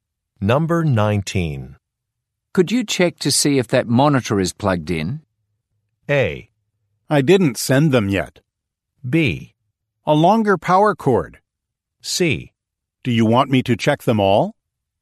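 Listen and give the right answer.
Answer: C: Do you want me to check them all?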